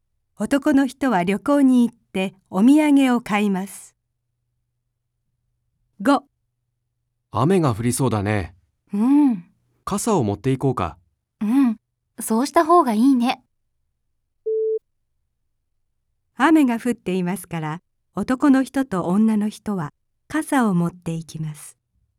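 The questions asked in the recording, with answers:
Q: 雨が降っていますから、男の人と女の人は傘を持っていきます。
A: ×(まだ降っていない)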